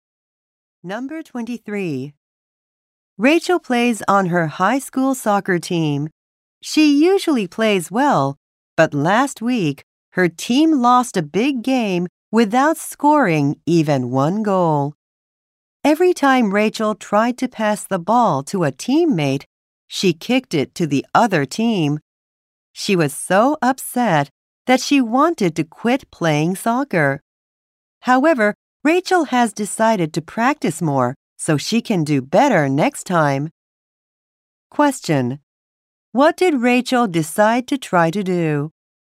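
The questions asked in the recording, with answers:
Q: What did Rachel decide to try to do?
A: Practice more to do better next time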